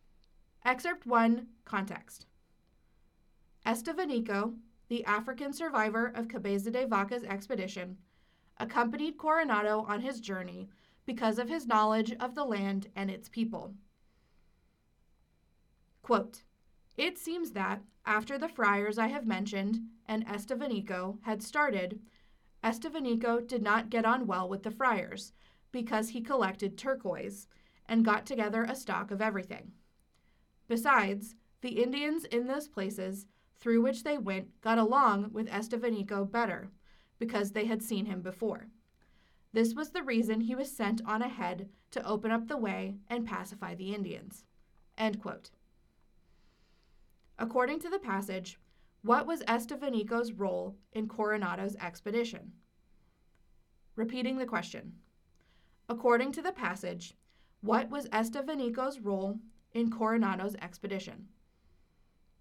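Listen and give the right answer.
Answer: He was sent ahead to open up the way and pacify the Indians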